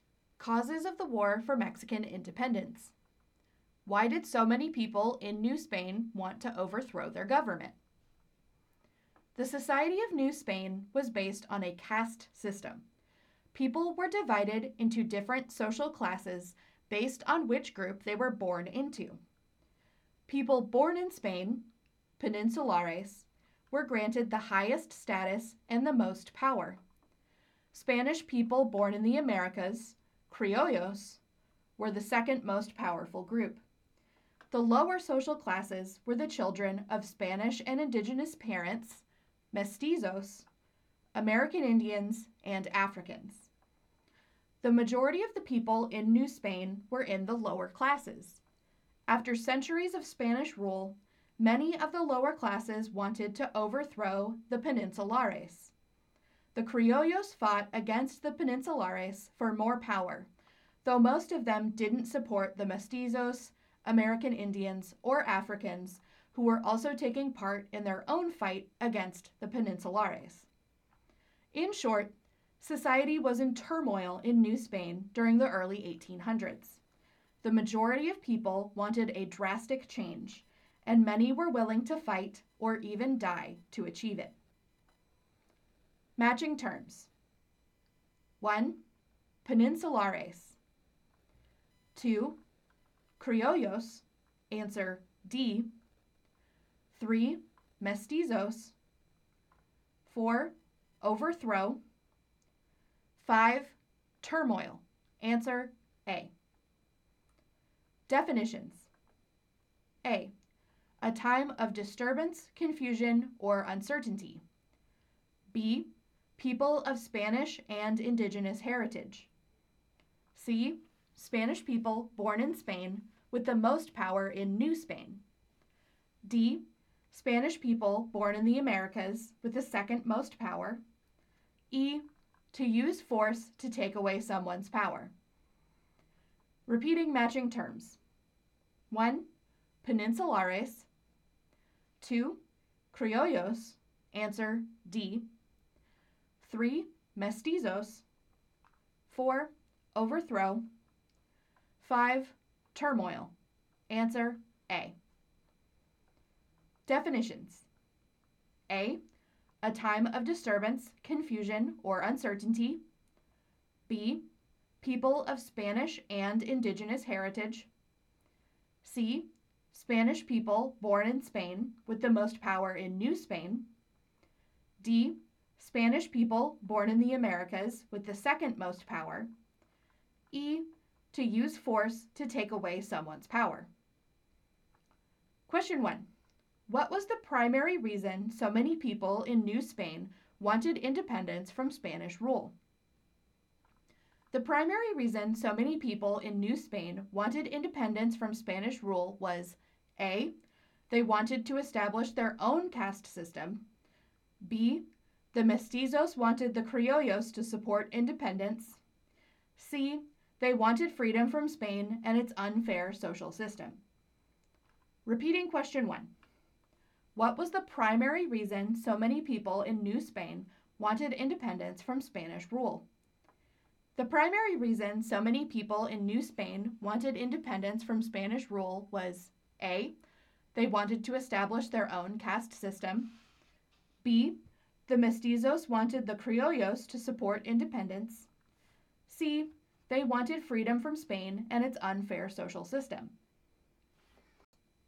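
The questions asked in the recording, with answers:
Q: What was the primary reason so many people in New Spain wanted independence from Spanish rule?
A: C: They wanted freedom from Spain and its unfair social system.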